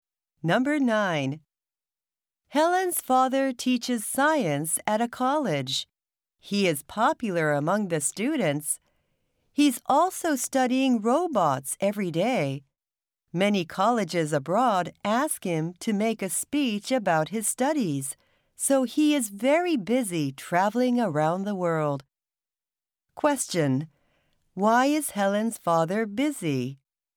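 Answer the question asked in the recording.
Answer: Because he travels around the world to give speeches about his studies at colleges abroad.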